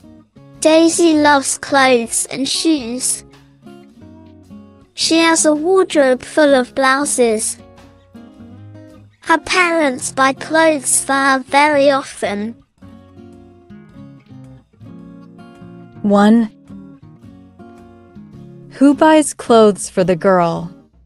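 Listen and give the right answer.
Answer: Her parents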